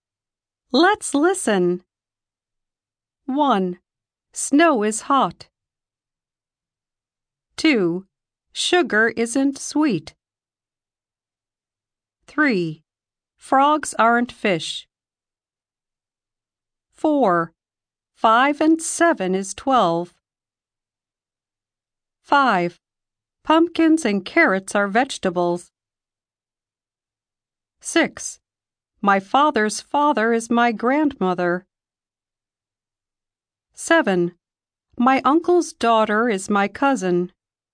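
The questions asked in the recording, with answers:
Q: Snow is hot.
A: False

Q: Sugar isn't sweet.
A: False

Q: Frogs aren't fish.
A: True

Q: 5 and 7 is 12.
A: True

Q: Pumpkins and carrots are vegetables.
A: True

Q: My father's father is my grandmother.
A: False

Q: My uncle's daughter is my cousin.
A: True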